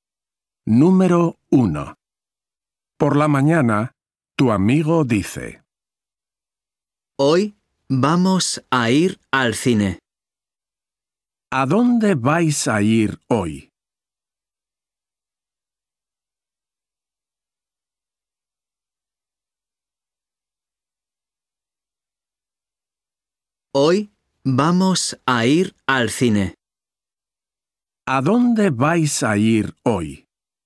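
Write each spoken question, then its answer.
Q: ¿A dónde vais a ir hoy?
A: Al cine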